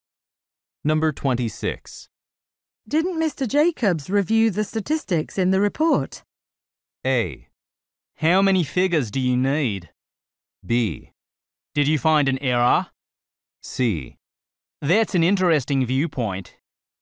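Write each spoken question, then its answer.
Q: Didn't Mr. Jacobs review the statistics in the report?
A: B: Did you find an error?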